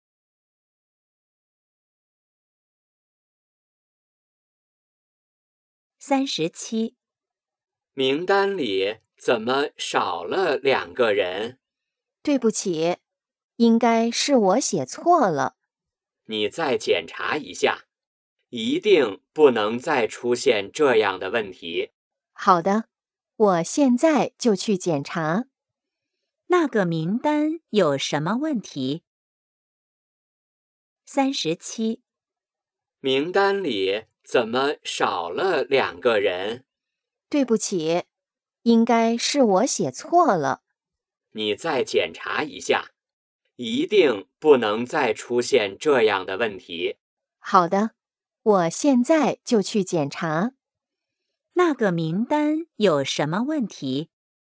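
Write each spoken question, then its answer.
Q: 那个名单有什么问题?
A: 少了两个人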